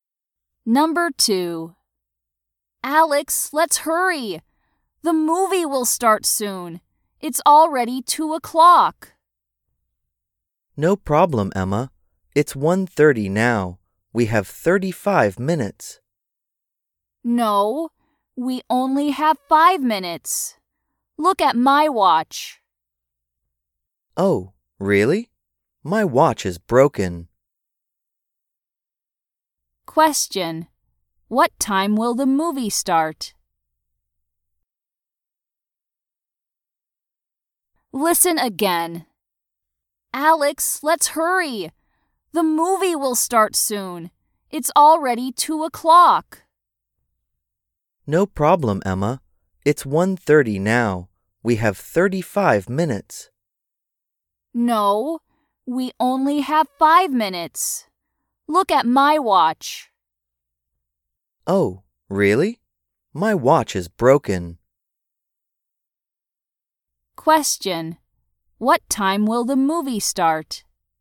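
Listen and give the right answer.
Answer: At 2:05.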